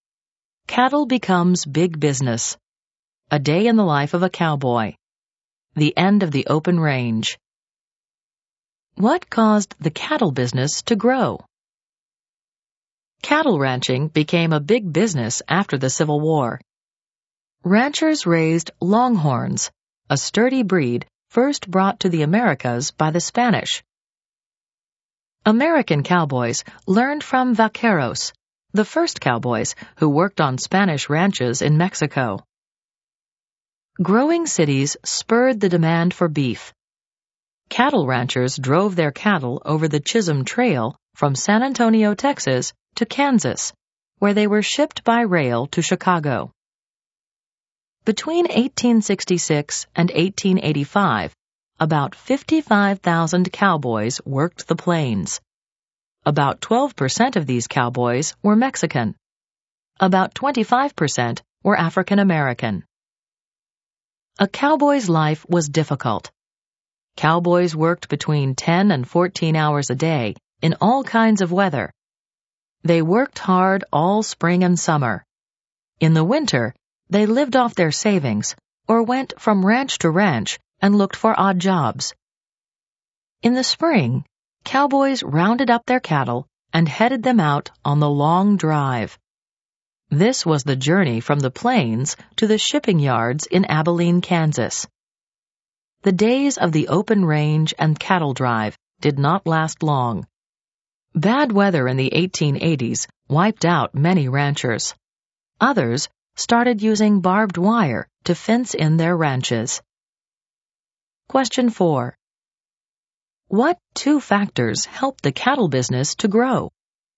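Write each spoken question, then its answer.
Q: What two factors helped the cattle business to grow?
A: Growing cities increased the demand for beef, and railroads shipped cattle from Kansas to Chicago.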